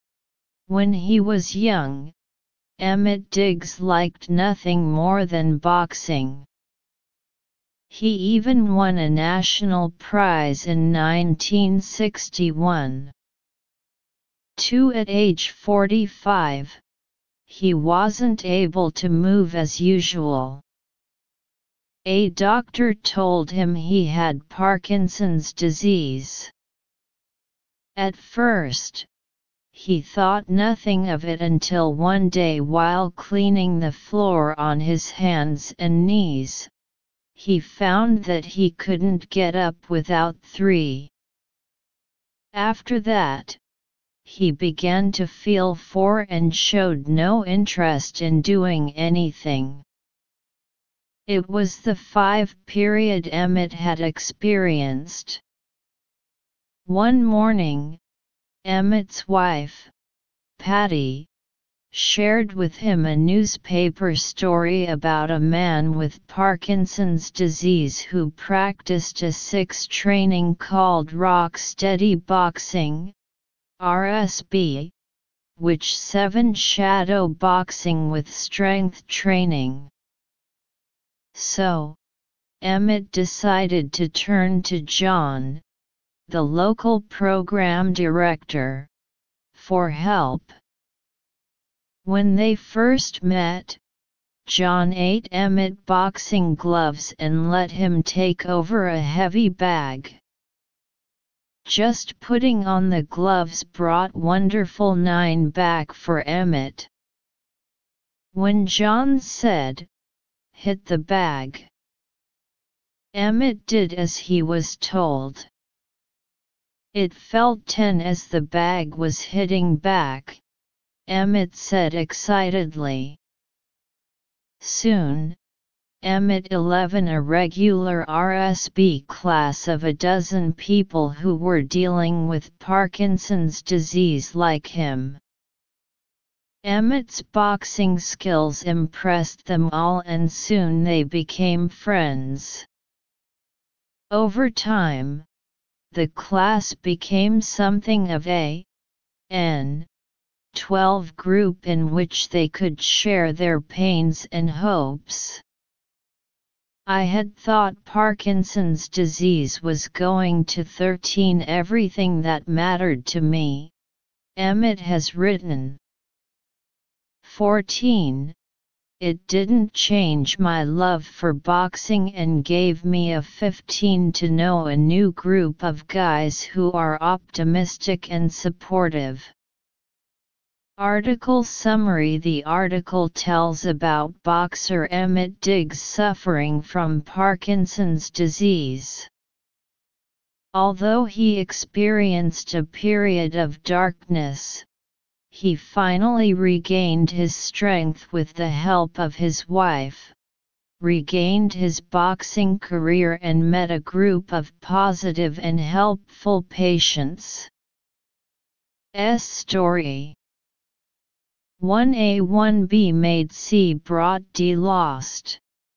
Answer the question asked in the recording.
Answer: Choose A sentence meaning.